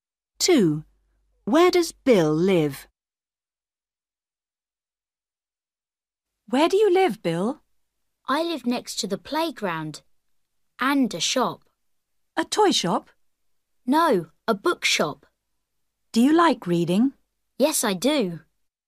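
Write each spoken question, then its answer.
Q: Where does Bill live?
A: next to the playground and a bookshop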